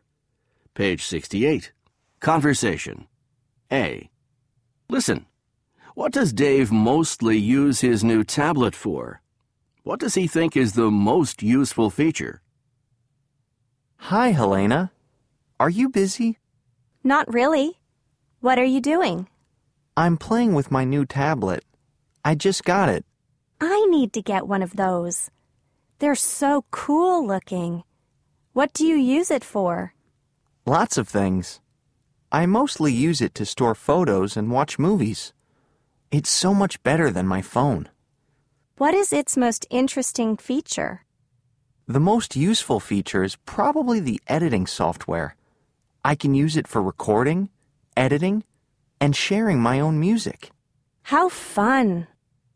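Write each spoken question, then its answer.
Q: What does Dave mostly use his new tablet for?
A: To store photos and watch movies

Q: What does he think is the most useful feature?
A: The editing software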